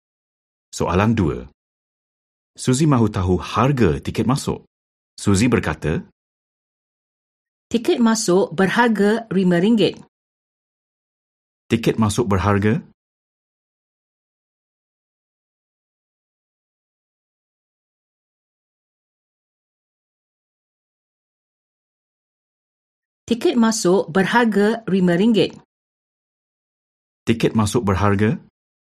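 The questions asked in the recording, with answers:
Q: Tiket masuk berharga?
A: RM5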